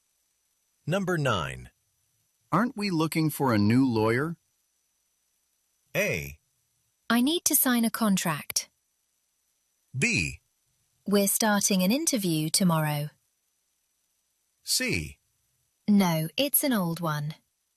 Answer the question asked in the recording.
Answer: 우리는 인터뷰를 시작할 것입니다라는 것이 역시 네, 변호사